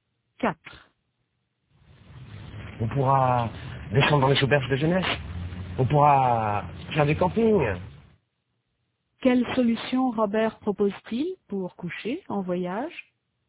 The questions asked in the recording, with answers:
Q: Quelle solution Robert propose-t-il pour coucher en voyage?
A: Il propose de descendre dans les auberges de jeunesse ou de faire du camping.